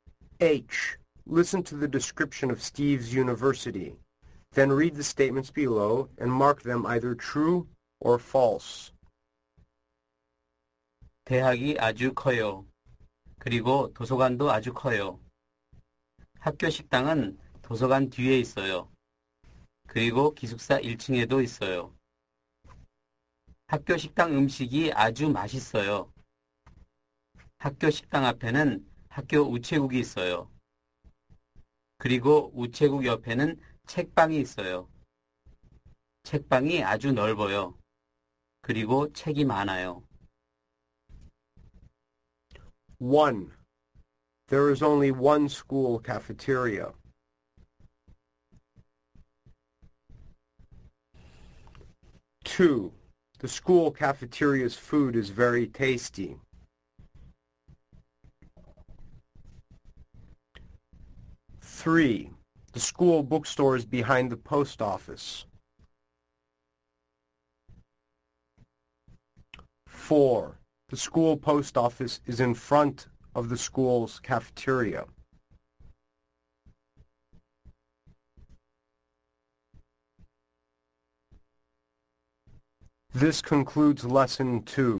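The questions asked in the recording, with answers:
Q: There is only one school cafeteria.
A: False

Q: The school cafeteria's food is very tasty.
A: True

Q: the school bookstore is behind the post office.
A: False

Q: the school post office is in front of the school's cafeteria.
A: True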